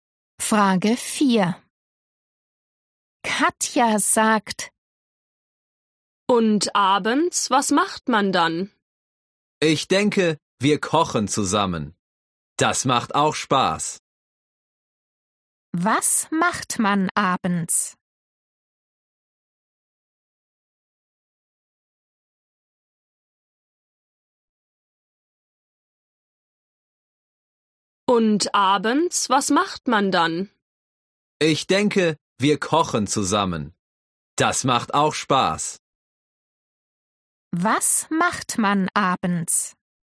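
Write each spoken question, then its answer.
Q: Was macht man abends?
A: Man kocht zusammen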